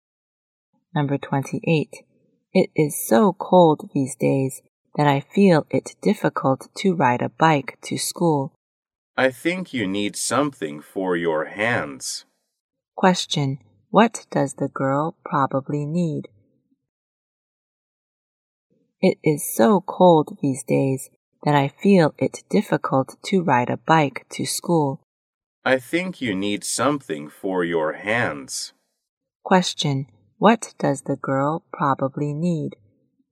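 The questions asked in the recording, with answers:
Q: What does the girl probably need?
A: Gloves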